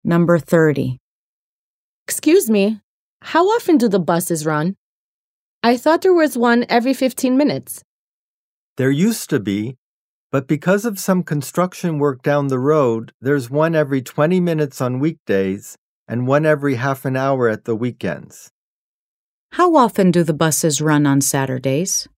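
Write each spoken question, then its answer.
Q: How often do the buses run on Saturdays?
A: Every half an hour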